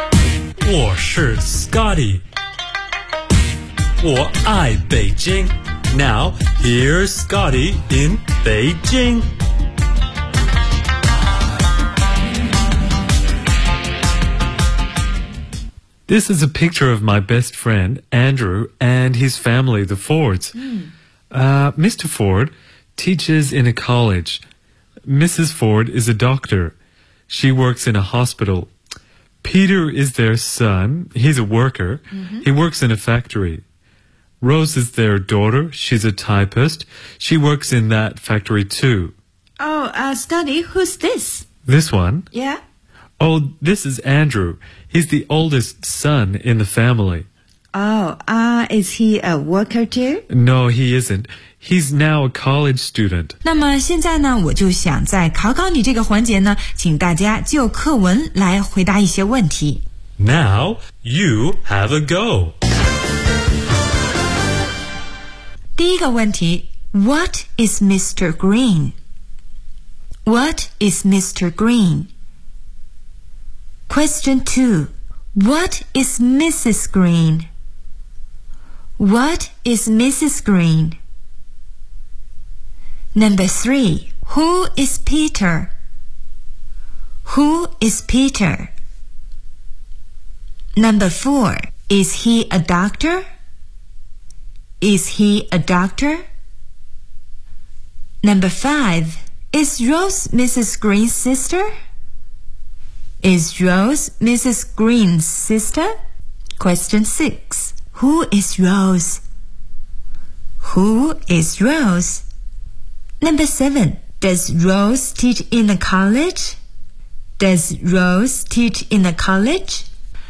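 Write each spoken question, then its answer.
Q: What is Mr. Green?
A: He's a teacher. He teaches in a college.

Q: What is Mrs. Green?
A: She's a doctor.

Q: Who is Peter?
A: He's their son.

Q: Is he a doctor?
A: No, he isn't. He's a worker.

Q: Is Rose Mrs. Green's sister?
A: No, she isn't. She's her daughter.

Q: Who is Rose?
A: She's their daughter.

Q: Does Rose teach in a college?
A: No, she doesn't. She's a typist and works in a factory.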